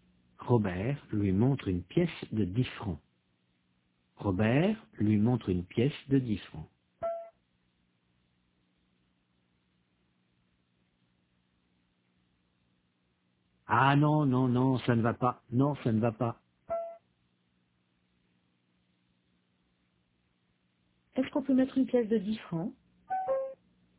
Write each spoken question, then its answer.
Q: Est-ce qu'on peut mettre une pièce de 10 francs ?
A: Non, ça ne va pas.